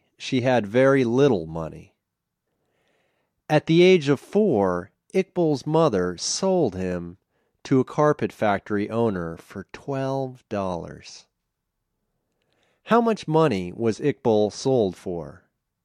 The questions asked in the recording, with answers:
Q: How much money was Iqbal sold for?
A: Iqbal was sold for $12.